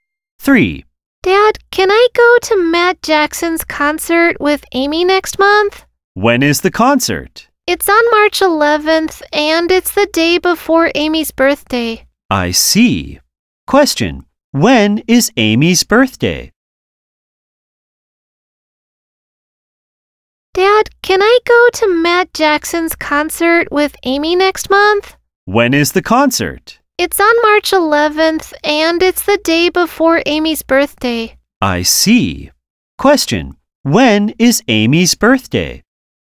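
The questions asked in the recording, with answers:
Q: when is Amy's birthday?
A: March 12th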